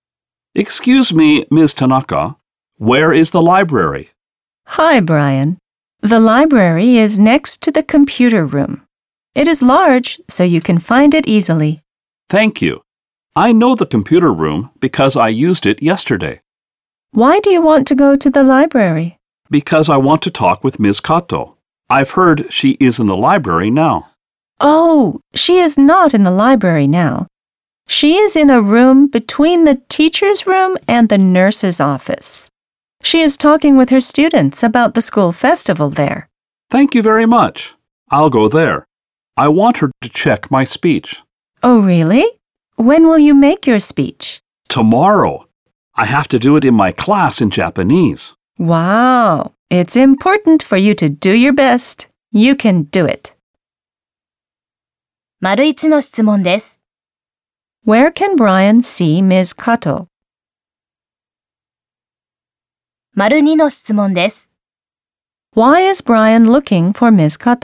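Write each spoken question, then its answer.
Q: Where can Brian see Ms. Kato?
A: In a room between the teacher's room and the nurse's office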